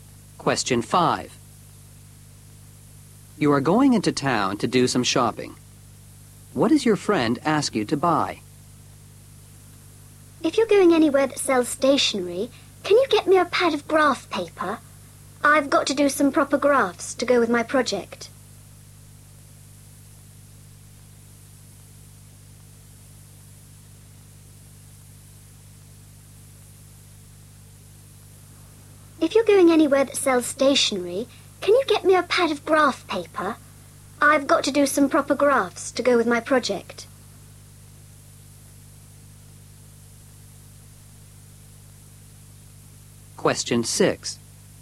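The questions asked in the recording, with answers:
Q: What does your friend ask you to buy?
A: A pad of graph paper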